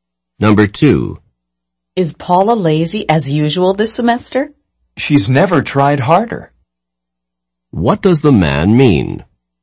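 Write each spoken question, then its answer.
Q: What does the man mean?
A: Paula is working harder than ever; she is not lazy.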